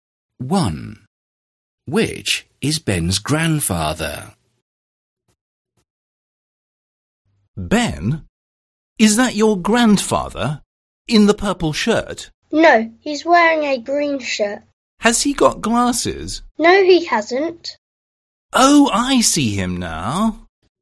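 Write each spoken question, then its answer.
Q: Which is Ben's grandfather?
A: The man in the green shirt without glasses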